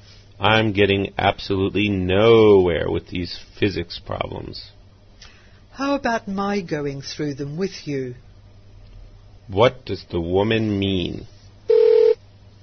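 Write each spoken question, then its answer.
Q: What does the woman mean?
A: She offers to help him with the physics problems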